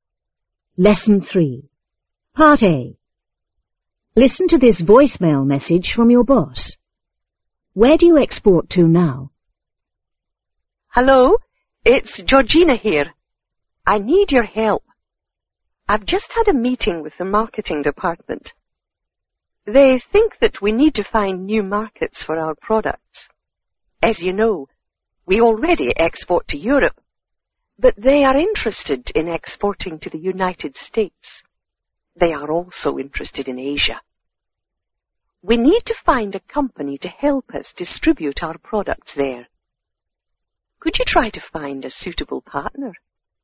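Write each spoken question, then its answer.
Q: Where do you export to now?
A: To Europe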